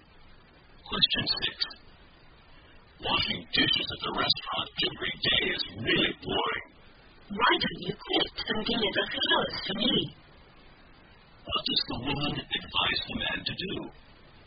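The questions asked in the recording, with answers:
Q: What does the woman advise the man to do?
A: Quit his restaurant job and deliver flowers for her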